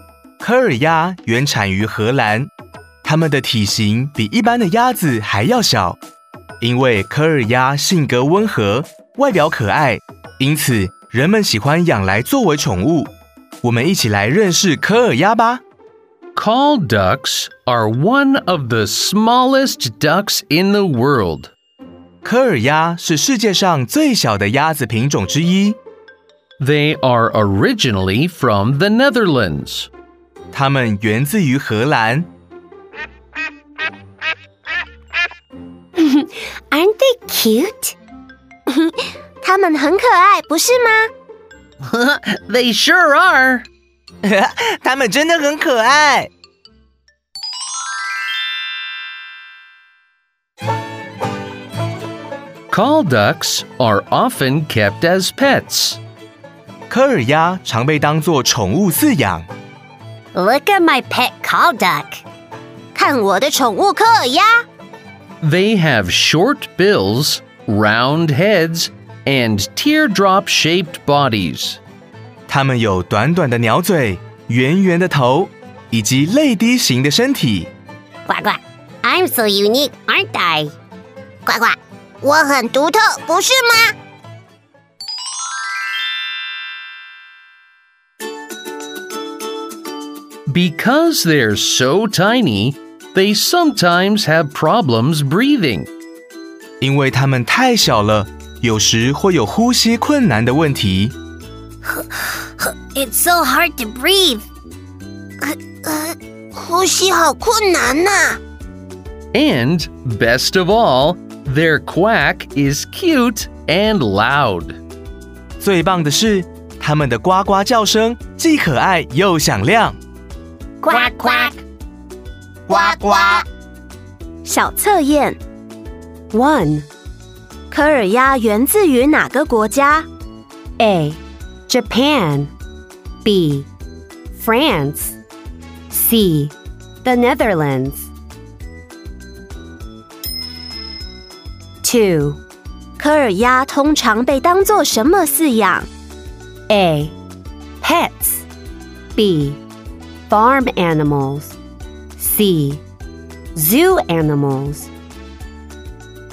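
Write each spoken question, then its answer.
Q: 科尔鸭源自于哪个国家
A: C: The Netherlands

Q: 科尔鸭通常被当作什么饲养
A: A: Pets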